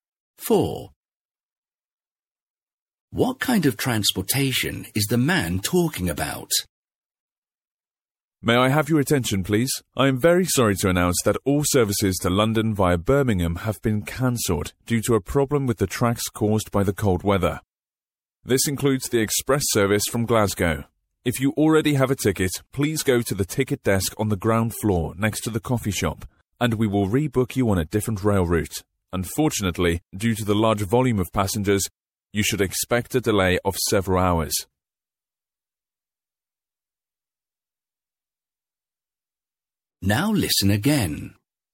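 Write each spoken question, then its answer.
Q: What kind of transportation is the man talking about?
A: Train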